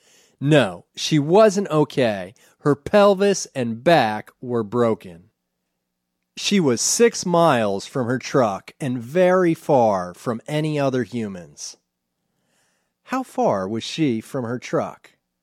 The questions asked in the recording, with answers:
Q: How far was she from her truck?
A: She was 6 miles from her truck.